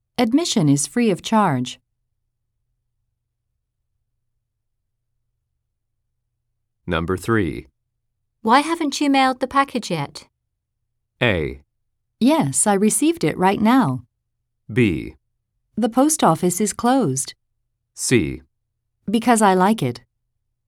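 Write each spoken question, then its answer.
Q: Why haven't you mailed the package yet?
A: B: The post office is closed.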